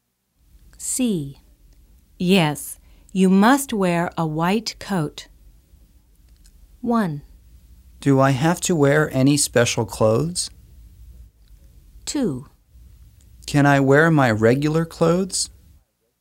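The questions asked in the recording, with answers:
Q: Yes, you must wear a white coat.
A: 1: Do I have to wear any special clothes?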